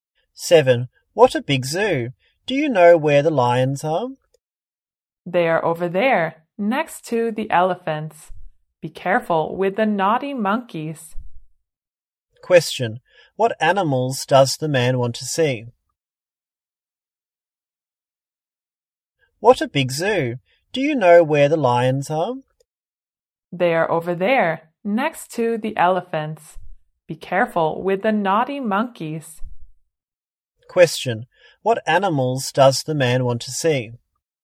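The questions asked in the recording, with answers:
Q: What animals does the man want to see?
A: Lions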